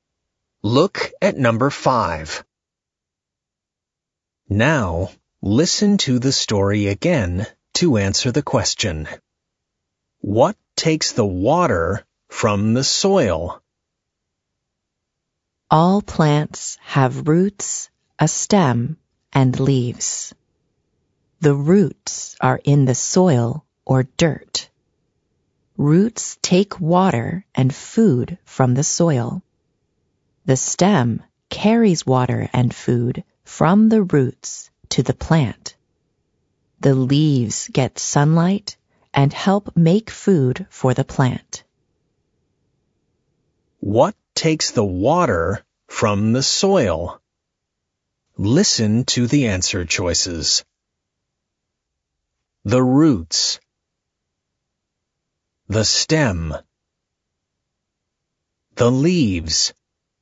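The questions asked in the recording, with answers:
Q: What takes the water from the soil?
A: A: The roots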